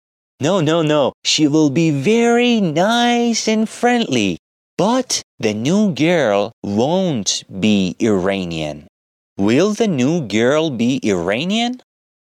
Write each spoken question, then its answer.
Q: Will the new girl be Iranian?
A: No. The new girl won't be Iranian.